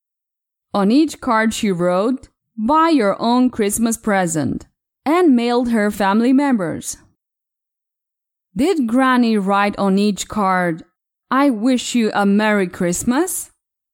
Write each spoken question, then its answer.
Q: Did Granny write on each card, "I wish you a Merry Christmas"?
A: No, no. She didn't write, "I wish you a Merry Christmas." Granny wrote, "Buy your own Christmas present."